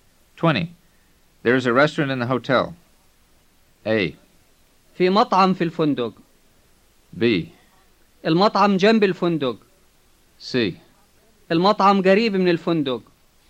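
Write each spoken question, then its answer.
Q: There is a restaurant in the hotel.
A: A: في مطعم في الفندق.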